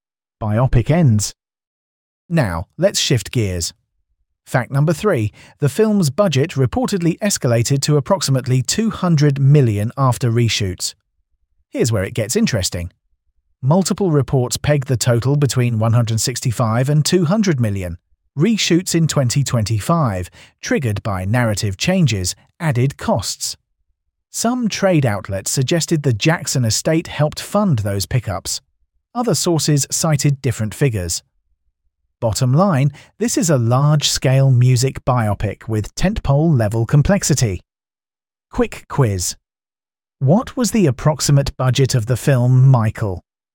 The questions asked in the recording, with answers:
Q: What was the approximate budget of the film Michael?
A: Correct answer, $200 million.